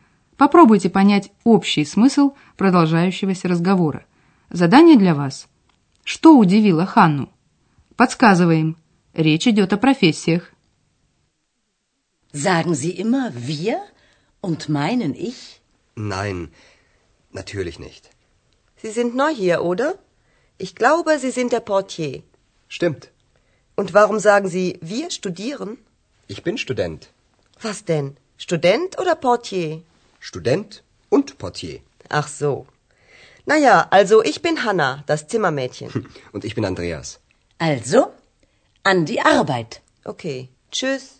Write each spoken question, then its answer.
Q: Что удивило Ханну?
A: Ханна удивилась, что Андреас назвался студентом, хотя он ей раньше сказал, что он администратор.